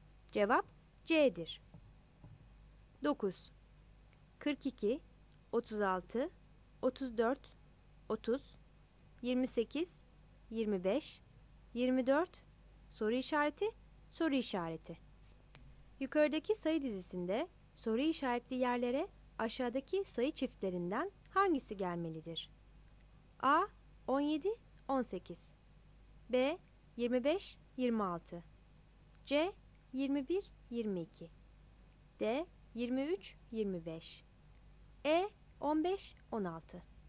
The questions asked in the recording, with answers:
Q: Yukarıdaki sayı dizisinde soru işaretli yerlere aşağıdaki sayı çiftlerinden hangisi gelmelidir?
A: Cevap C seçeneğidir.